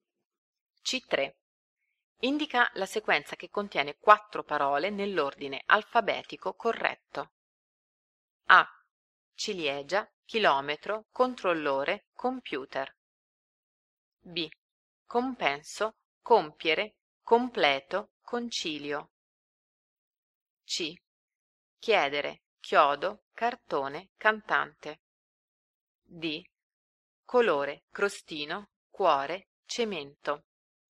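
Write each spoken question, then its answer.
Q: Indica la sequenza che contiene 4 parole nell'ordine alfabetico corretto.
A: B: Compenso, compiere, completo, concilio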